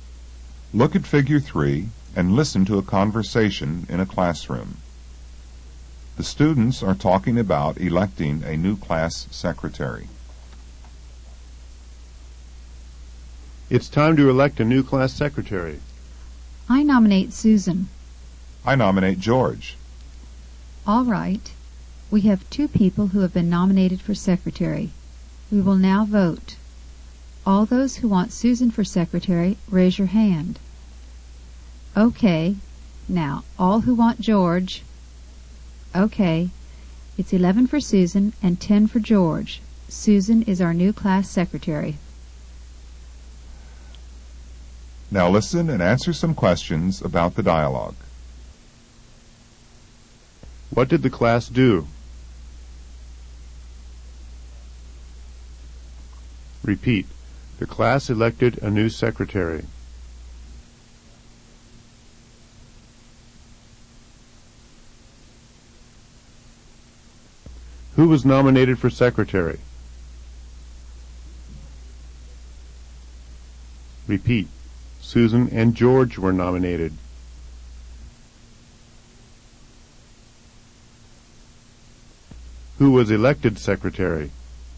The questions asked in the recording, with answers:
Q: What did the class do?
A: The class elected a new secretary.

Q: Who was elected secretary?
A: Susan was elected.